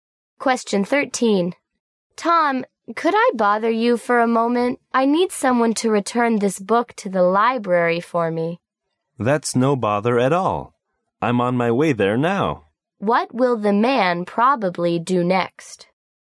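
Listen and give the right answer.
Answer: Take the book back to the library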